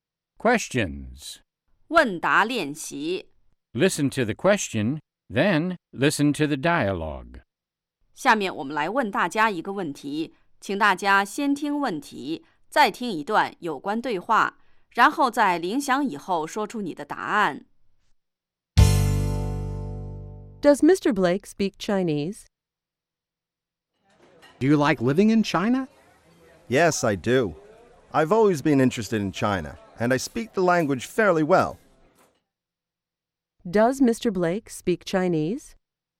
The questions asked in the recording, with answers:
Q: Does Mr. Blake speak Chinese?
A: Yes, he does. He speaks the language fairly well.